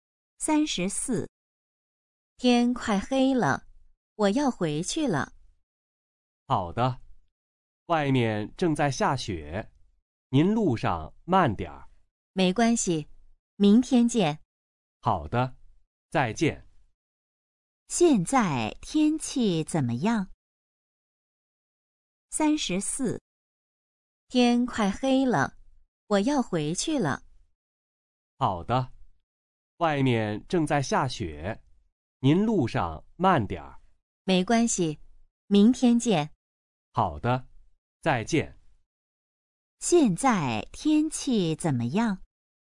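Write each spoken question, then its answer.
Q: 现在天气怎么样?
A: 正在下雪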